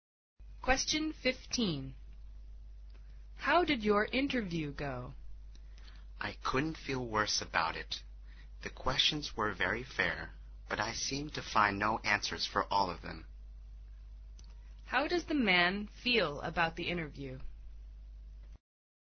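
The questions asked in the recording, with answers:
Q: How does the man feel about the interview?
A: Very bad; he couldn't answer the questions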